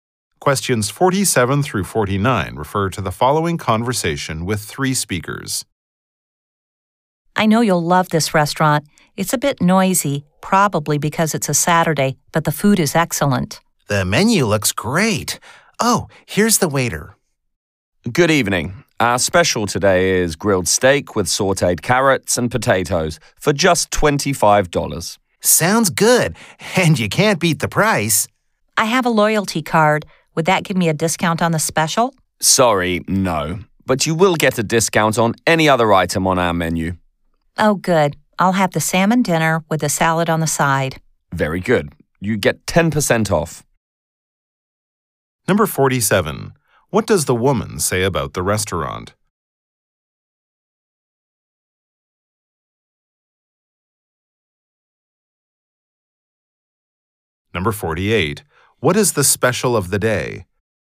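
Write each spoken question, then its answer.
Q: the restaurant?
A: It's a bit noisy but the food is excellent

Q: What is the special of the day?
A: Grilled steak with sauteed carrots and potatoes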